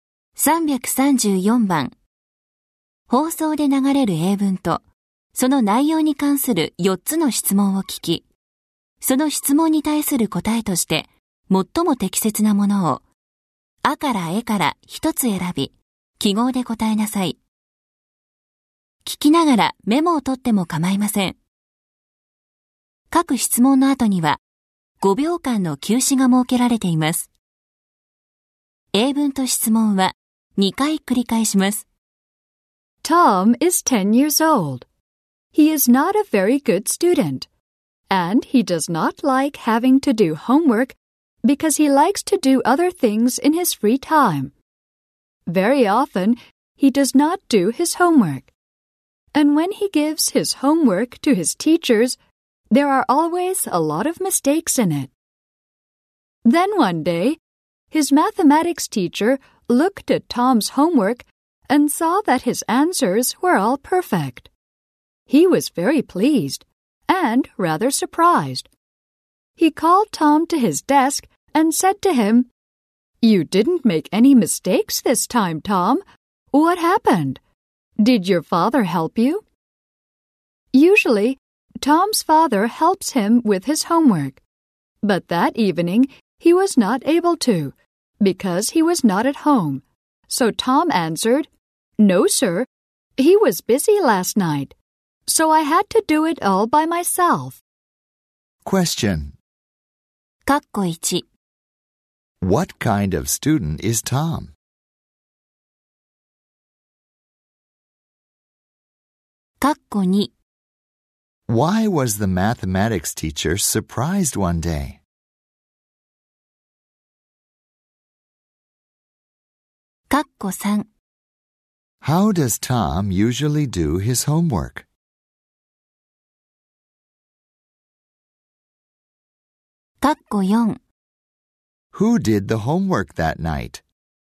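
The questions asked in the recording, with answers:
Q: What kind of student is Tom?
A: Not a very good student

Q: Why was the mathematics teacher surprised one day?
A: Tom's homework answers were all perfect

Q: How does Tom usually do his homework?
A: His father helps him

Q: Who did the homework that night?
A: Tom did it all by himself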